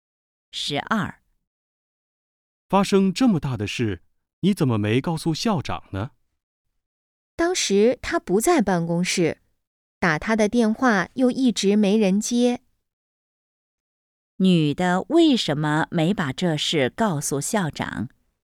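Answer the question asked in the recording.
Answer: 校长不在办公室,电话也没人接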